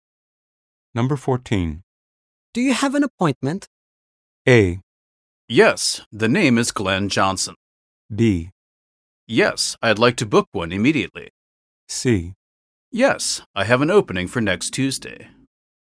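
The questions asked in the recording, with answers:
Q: Do you have an appointment?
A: A: Yes, the name is Glenn Johnson.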